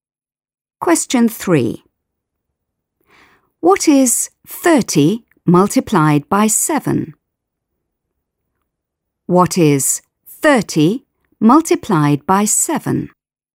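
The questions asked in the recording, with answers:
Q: What is 30 multiplied by 7?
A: 210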